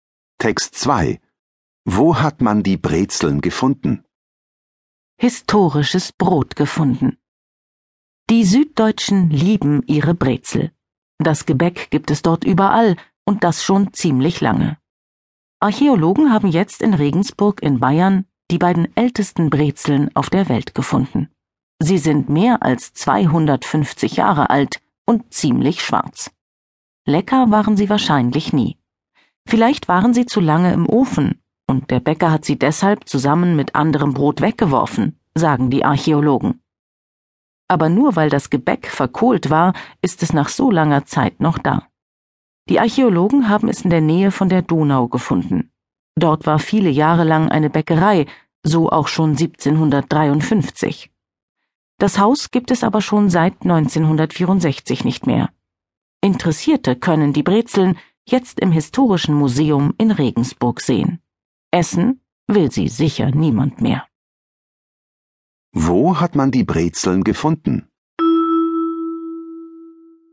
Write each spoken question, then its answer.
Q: Wo hat man die Brezeln gefunden?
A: Man hat die Brezeln in Regensburg gefunden.